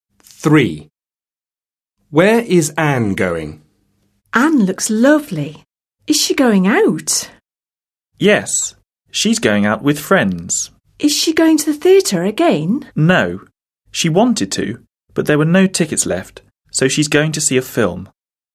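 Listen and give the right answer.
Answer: to the cinema (to see a film)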